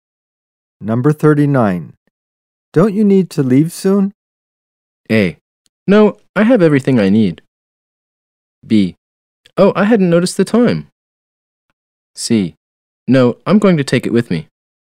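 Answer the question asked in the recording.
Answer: B: Oh, I hadn't noticed the time.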